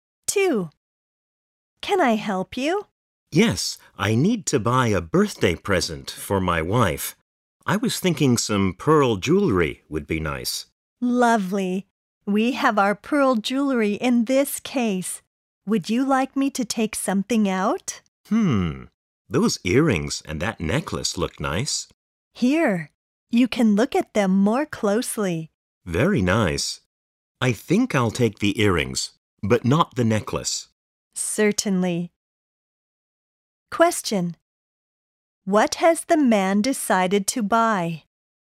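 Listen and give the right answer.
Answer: Pearl earrings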